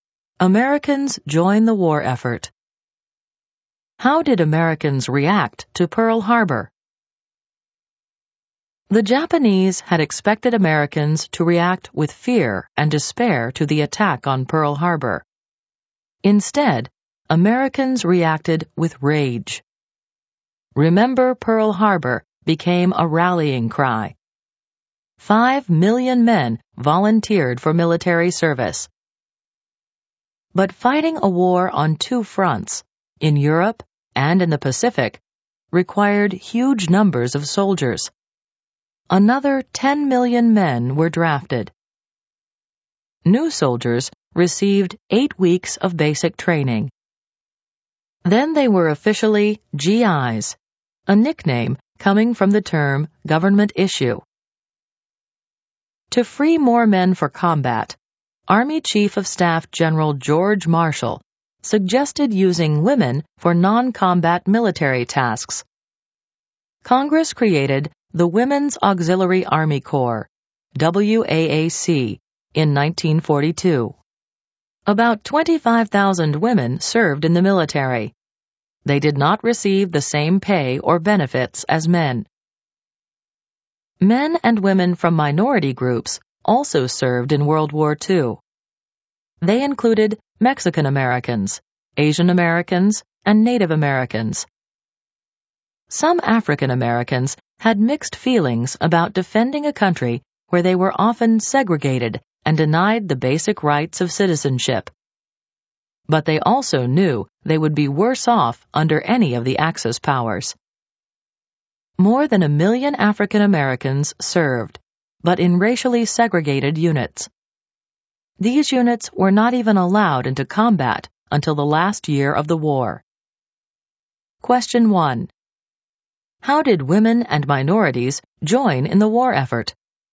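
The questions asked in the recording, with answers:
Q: How did women and minorities join in the war effort?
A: Women served in non-combat military jobs in the WAAC (about 25,000, without equal pay or benefits). Minorities, including Mexican, Asian, Native and over 1 million African Americans, served in the military, with African Americans in segregated units.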